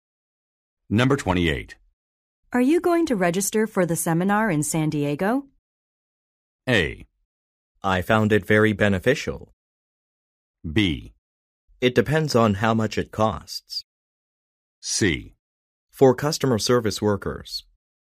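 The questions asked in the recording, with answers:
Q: Are you going to register for the seminar in San Diego?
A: B: It depends on how much it costs.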